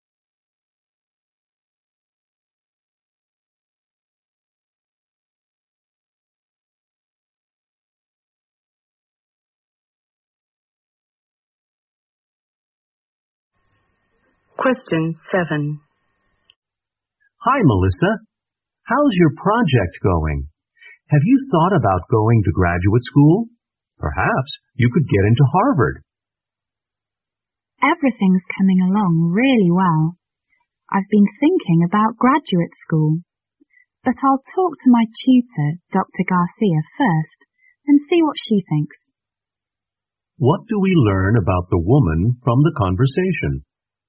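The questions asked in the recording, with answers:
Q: What do we learn about the woman from the conversation?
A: She will talk to her tutor before deciding about graduate school.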